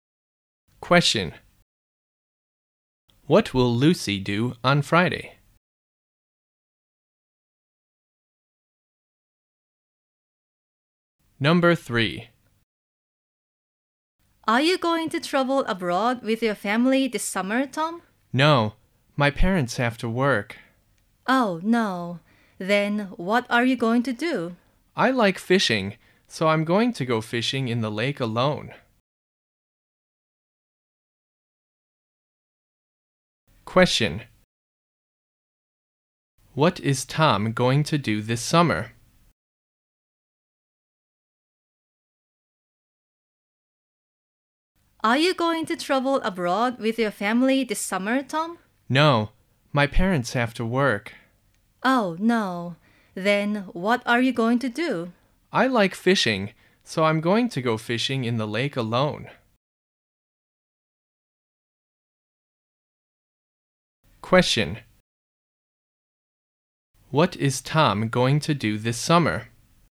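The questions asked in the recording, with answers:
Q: What is Tom going to do this summer?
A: He is going to go fishing in the lake alone.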